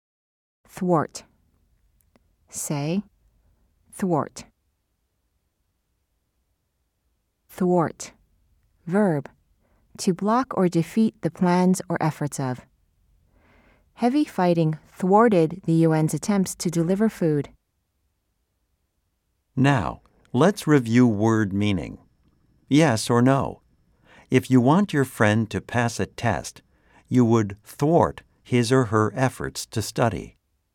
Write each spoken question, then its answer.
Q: Yes or no? If you want your friend to pass a test, you would thwart his or her efforts to study.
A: If you said no, you are right.